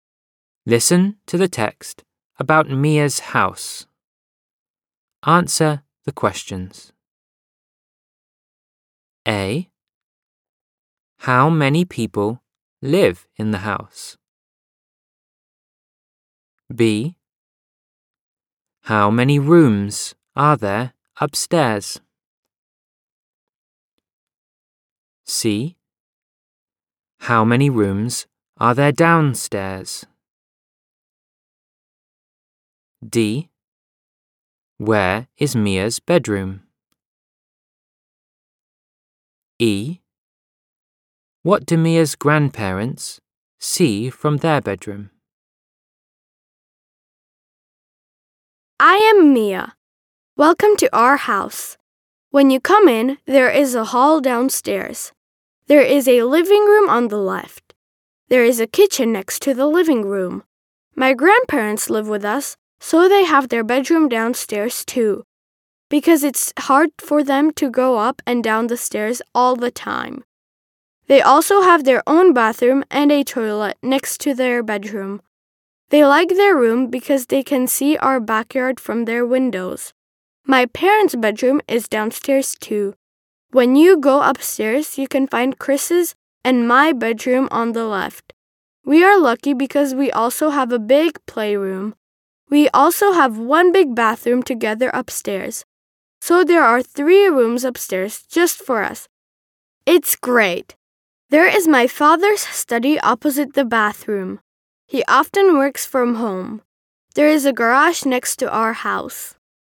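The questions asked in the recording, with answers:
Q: Where is Mia's bedroom?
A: Upstairs on the left (shared with Chris)

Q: What do Mia's grandparents see from their bedroom?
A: The backyard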